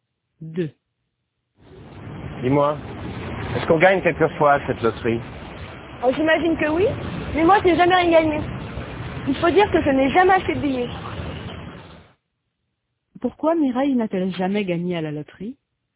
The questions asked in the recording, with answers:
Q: Pourquoi Mireille n'a-t-elle jamais gagné à la loterie?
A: Parce qu'elle n'a jamais acheté de billets.